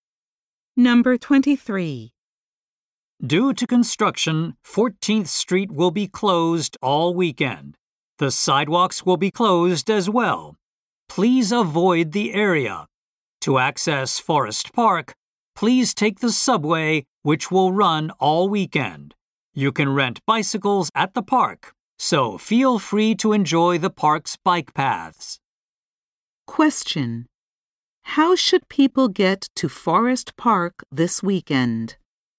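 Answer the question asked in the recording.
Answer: By subway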